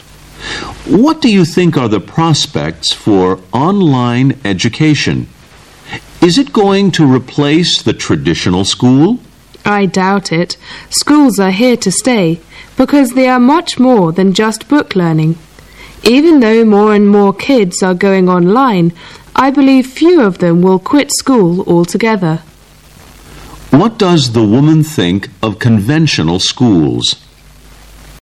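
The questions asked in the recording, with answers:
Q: What does the woman think of conventional schools?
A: They will not be replaced by online education; they are here to stay because they offer more than book learning.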